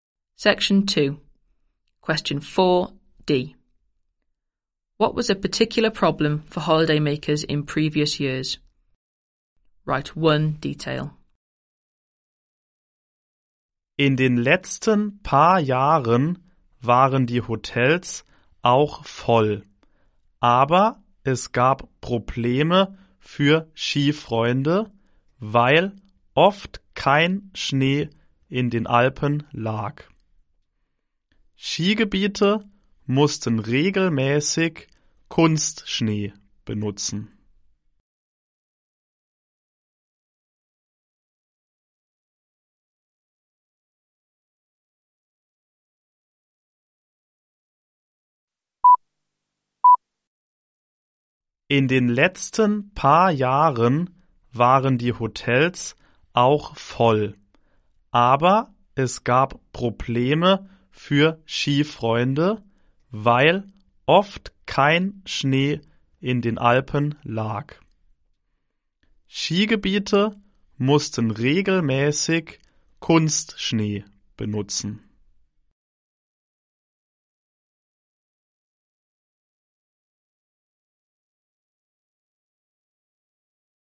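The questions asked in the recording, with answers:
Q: What was a particular problem for holidaymakers in previous years?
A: Often no snow in the Alps (artificial snow had to be used)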